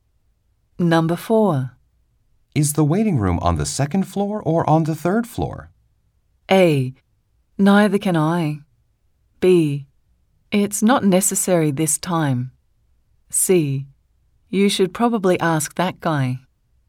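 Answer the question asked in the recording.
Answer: C: You should probably ask that guy.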